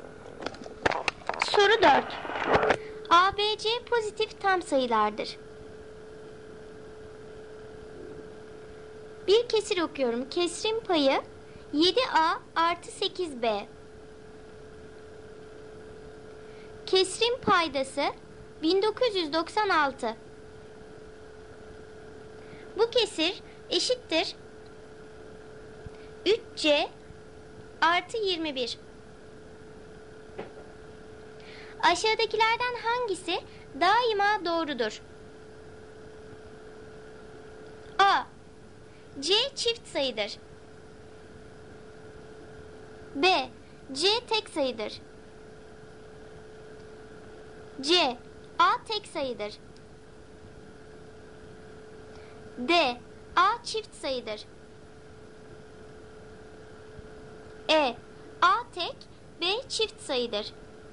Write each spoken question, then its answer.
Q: Aşağıdakilerden hangisi daima doğrudur?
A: Doğru cevap D seçeneği. A çift sayıdır.